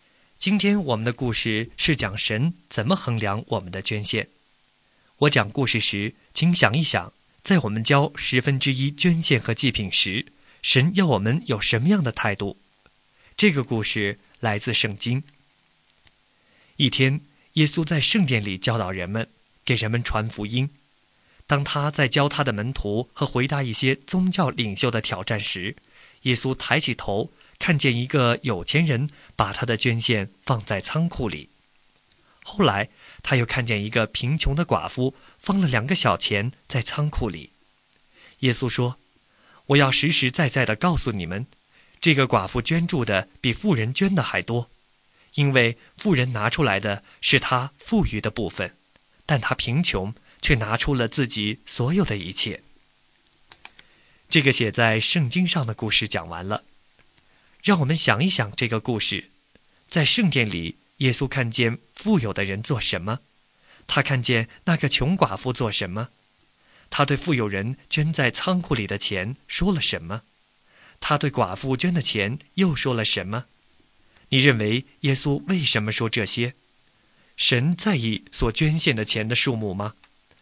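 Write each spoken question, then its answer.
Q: 在圣殿里,耶稣看见富有的人做什么?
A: 把他的捐献放在仓库里

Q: 他看见那个穷寡妇做什么?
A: 放了两个小钱在仓库里

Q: 他对富有人捐在仓库里的钱说了什么?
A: 富人拿出来的是他富余的部分

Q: 他对寡妇捐的钱又说了什么?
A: 寡妇捐的比富人还多,因为她拿出了自己所有的一切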